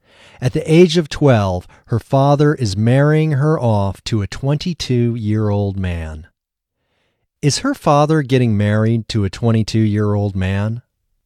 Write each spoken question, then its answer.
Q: Is her father getting married to a 22-year-old man?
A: No, her father isn't getting married to a 22-year-old man.